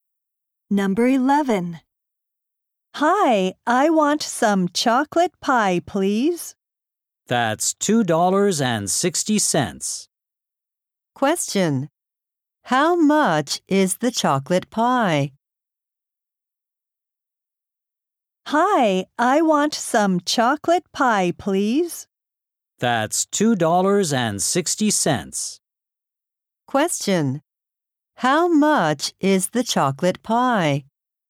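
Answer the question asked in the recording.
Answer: $2.60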